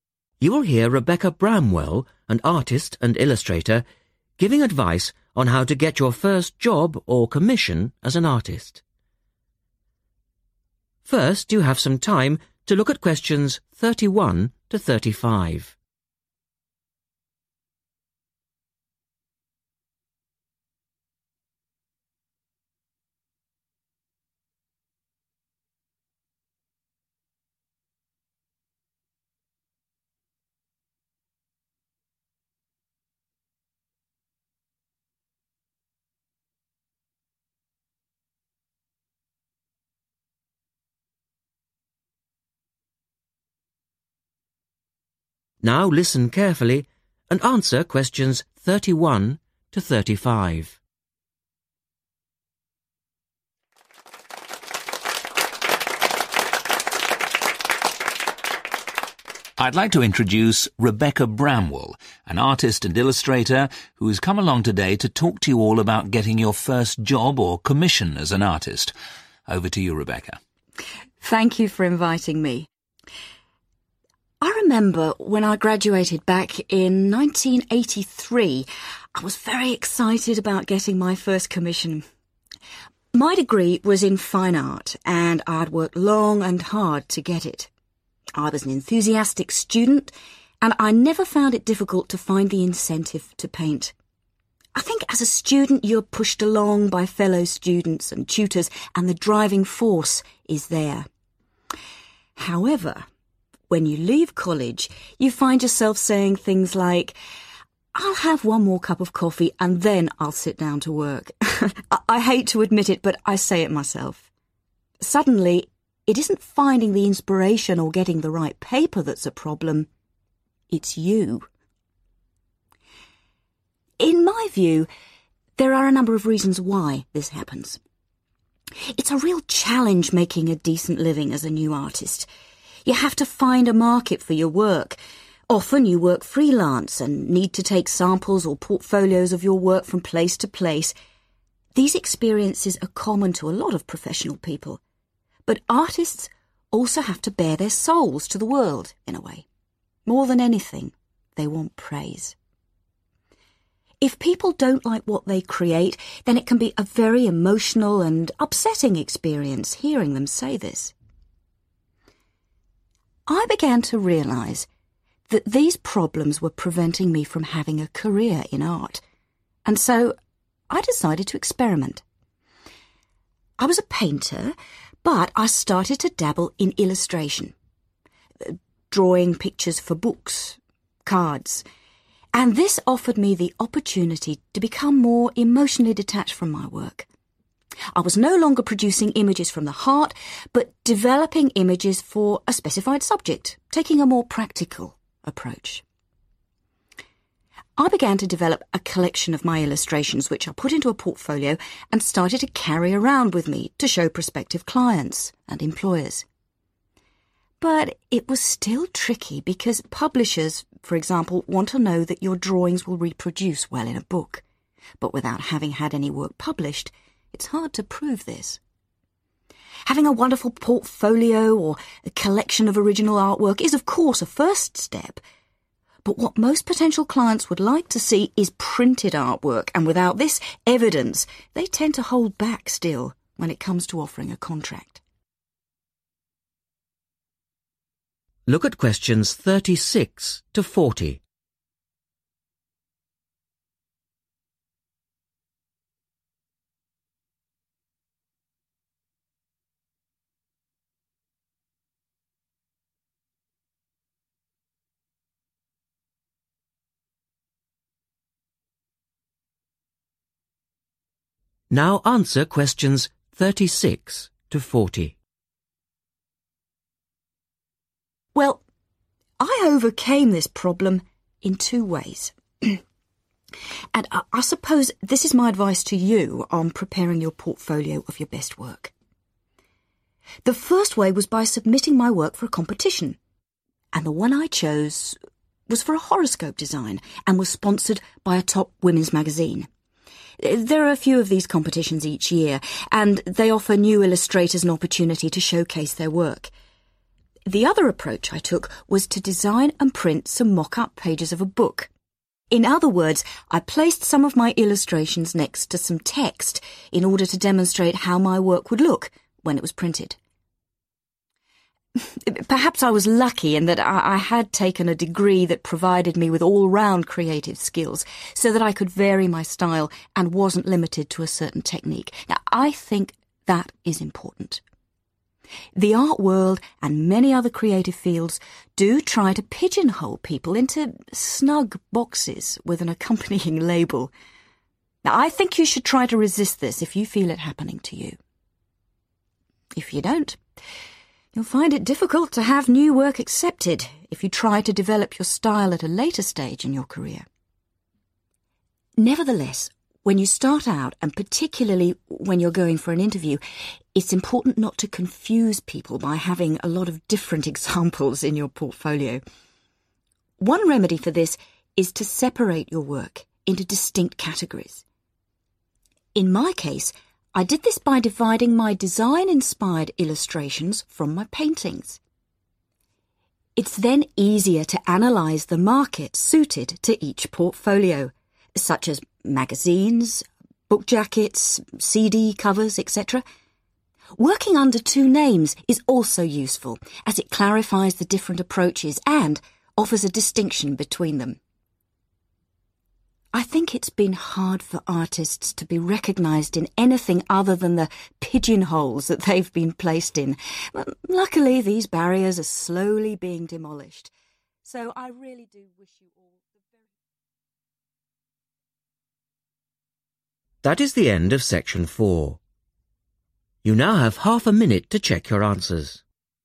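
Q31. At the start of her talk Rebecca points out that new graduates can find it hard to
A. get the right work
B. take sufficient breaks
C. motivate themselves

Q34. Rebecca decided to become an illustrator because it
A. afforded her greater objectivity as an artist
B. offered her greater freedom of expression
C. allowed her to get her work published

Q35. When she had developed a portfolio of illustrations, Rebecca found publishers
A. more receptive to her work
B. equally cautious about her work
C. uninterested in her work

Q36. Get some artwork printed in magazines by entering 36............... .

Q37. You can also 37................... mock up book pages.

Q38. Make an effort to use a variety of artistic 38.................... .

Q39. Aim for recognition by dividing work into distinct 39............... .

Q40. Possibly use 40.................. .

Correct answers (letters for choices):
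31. C
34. A
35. B
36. competitions
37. design and print
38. styles
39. categories
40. two names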